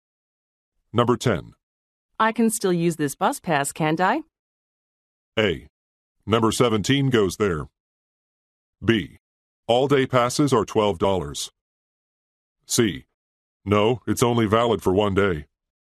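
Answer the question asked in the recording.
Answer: C: No, it's only valid for one day.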